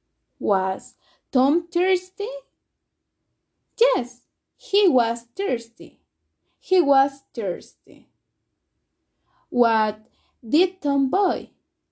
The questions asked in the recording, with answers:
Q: What did Tom buy?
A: A bottle of water. He bought a bottle of water at the supermarket.